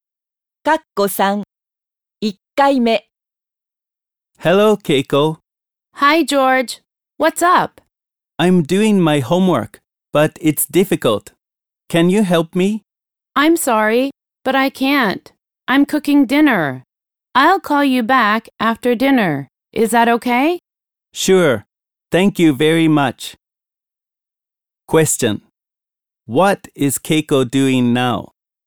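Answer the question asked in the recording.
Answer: She is cooking dinner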